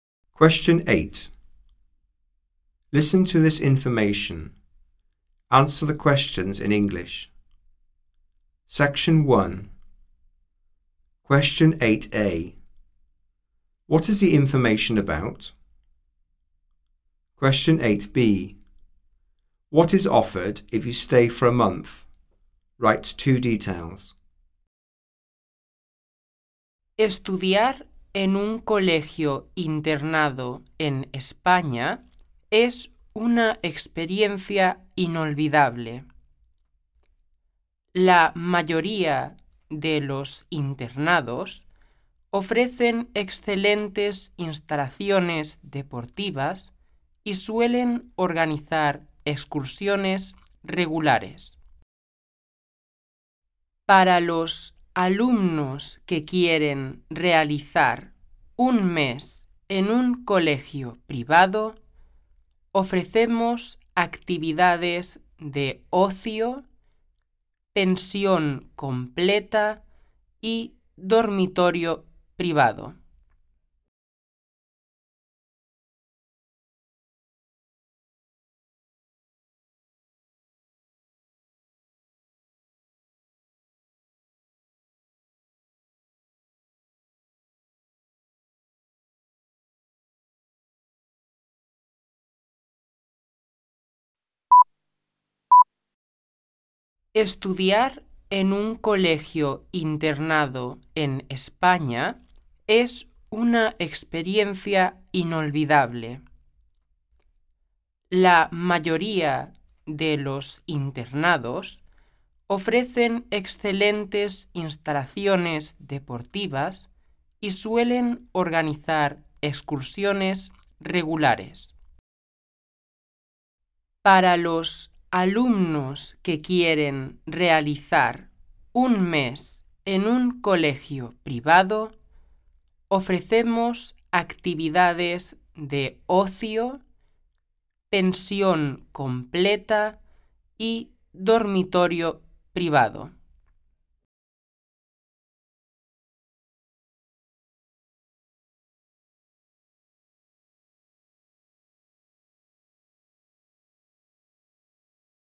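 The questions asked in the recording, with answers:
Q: What is the information about?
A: Studying at a boarding school in Spain

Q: What is offered if you stay for a month?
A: Leisure activities, full board, private bedroom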